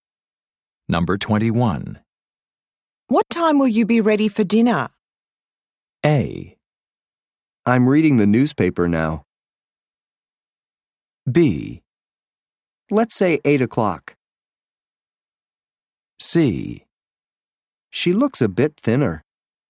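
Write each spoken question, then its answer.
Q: What time will you be ready for dinner?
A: B: Let's say 8 o'clock.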